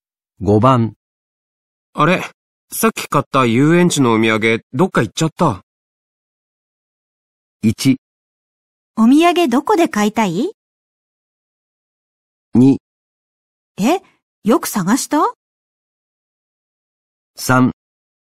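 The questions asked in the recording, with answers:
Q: あれ、さっき買った遊園地のお土産どっか行っちゃった。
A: 2: え、よく探した?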